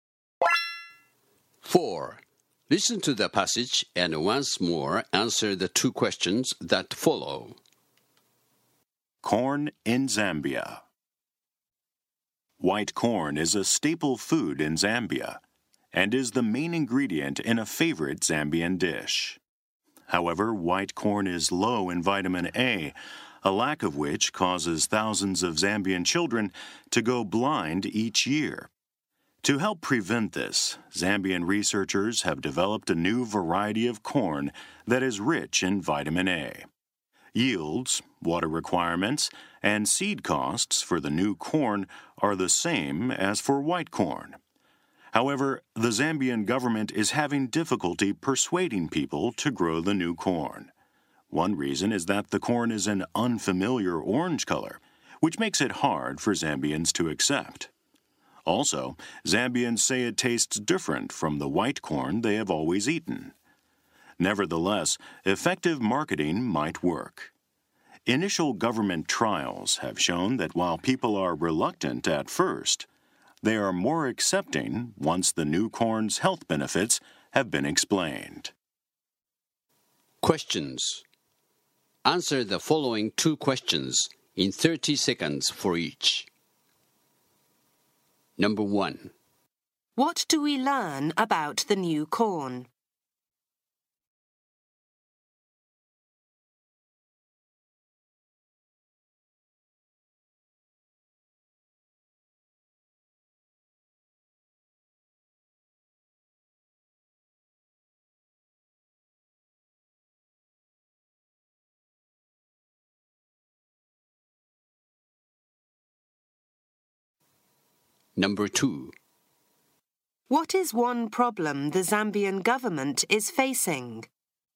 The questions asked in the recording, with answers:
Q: What do we learn about the new corn?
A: It doesn't cost more to grow and harvest the new corn than the white corn. The new corn is orange in color, but rich in vitamin A.

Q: What is one problem the Zambian government is facing?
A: The government is facing difficulty in persuading people to grow the new corn.